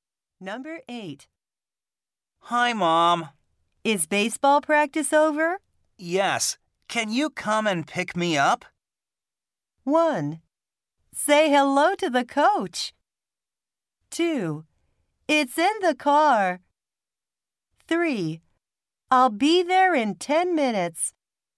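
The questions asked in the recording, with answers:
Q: Yes. Can you come and pick me up?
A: 3: I'll be there in 10 minutes.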